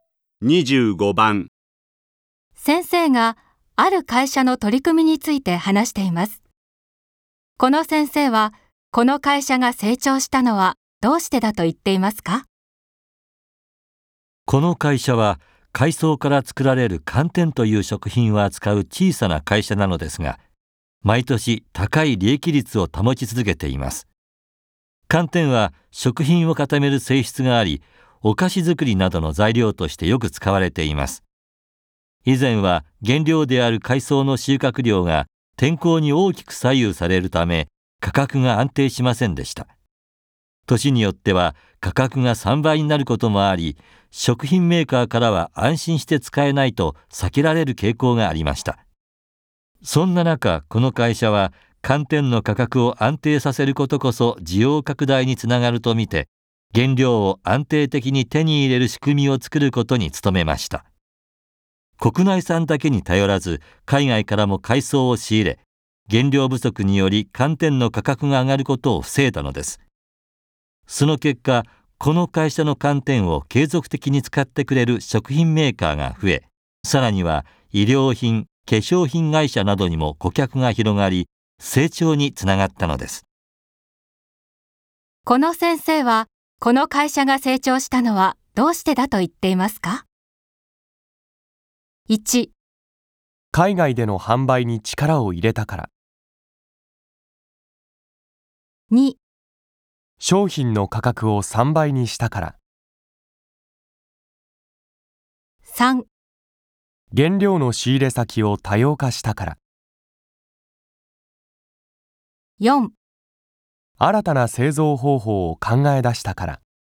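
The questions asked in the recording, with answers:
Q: この先生はこの会社が成長したのはどうしてだと言っていますか?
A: 3: 原料の仕入れ先を多様化したから。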